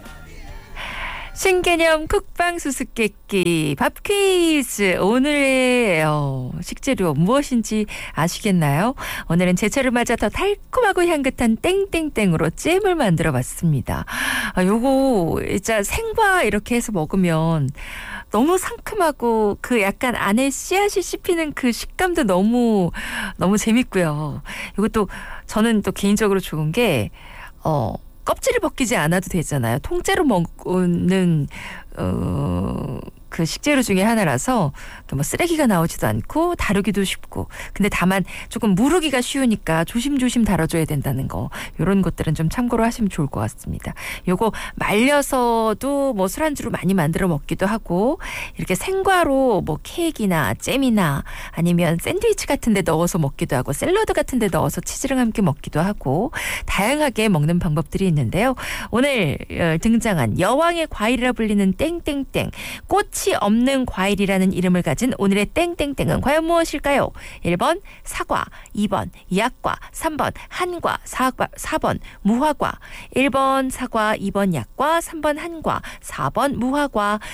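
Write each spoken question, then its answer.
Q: 오늘 등장한 여왕의 과일이라 불리는 땡땡땡, 꽃 꽃이 없는 과일이라는 이름을 가진 오늘의 땡땡땡은 과연 무엇일까요?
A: 4: 무화과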